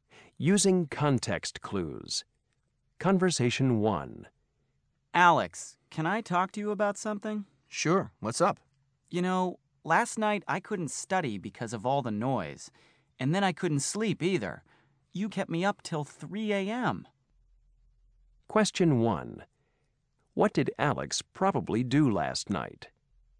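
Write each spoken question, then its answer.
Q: What did Alex probably do last night?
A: He made a lot of noise and kept his roommate up late.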